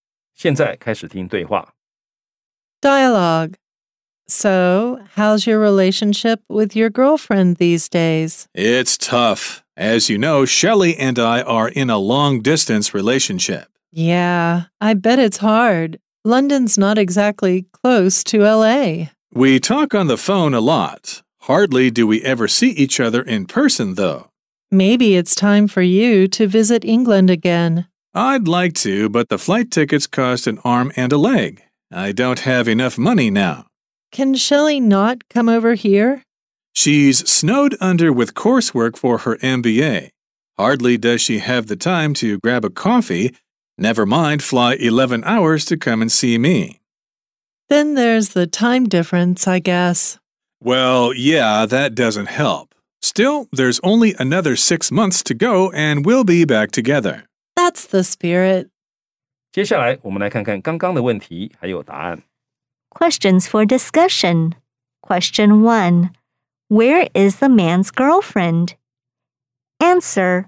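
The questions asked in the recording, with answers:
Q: Where is the man's girlfriend?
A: In London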